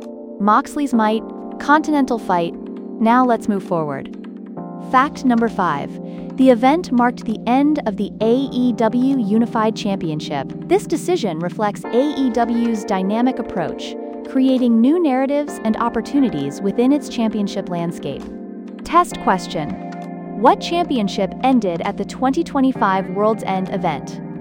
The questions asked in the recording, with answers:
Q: What championship ended at the 2025 World's End event?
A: Correct answer. AEW Unified Championship.